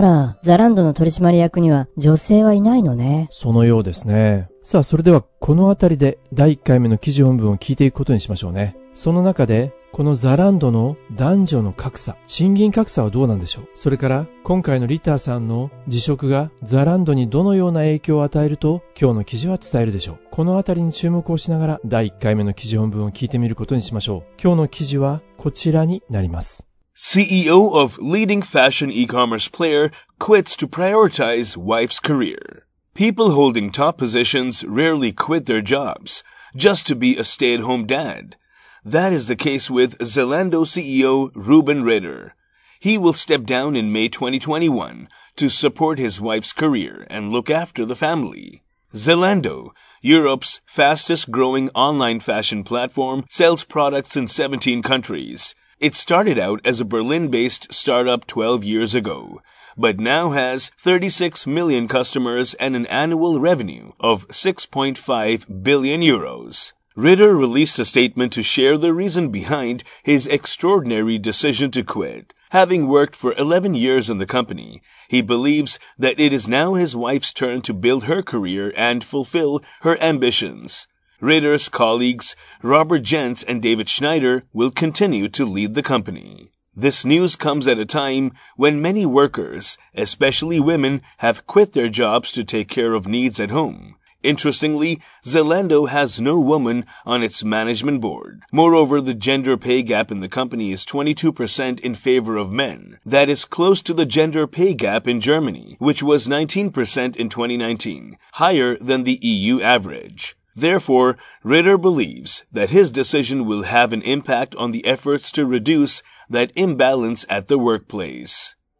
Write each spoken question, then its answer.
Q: その中でこのザランドの男女の格差、賃金格差はどうなんでしょう。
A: Moreover, the gender pay gap in the company is 22% in favor of men.